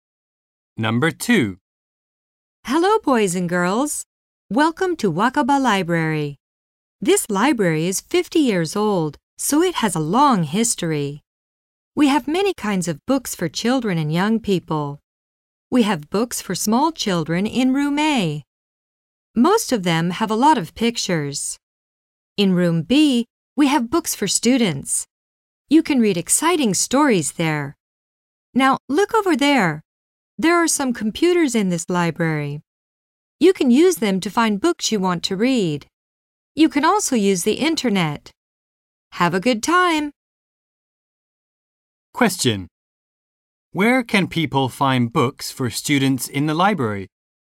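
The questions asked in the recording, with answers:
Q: Where can people find books for students in the library?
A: In Room B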